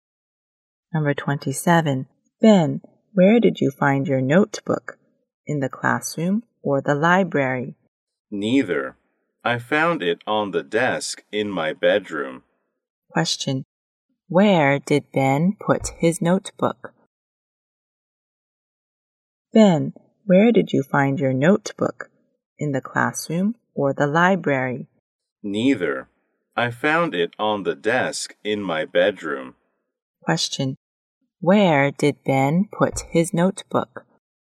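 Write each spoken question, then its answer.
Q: Where did Ben put his notebook?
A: On the desk in his bedroom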